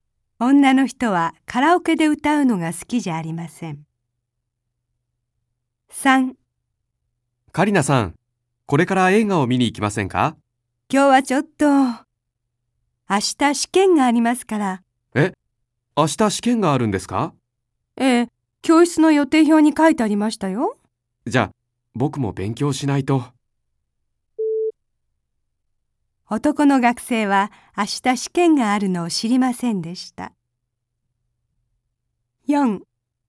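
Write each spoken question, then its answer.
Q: 男の学生は明日試験があるのを知りませんでした。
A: 正しい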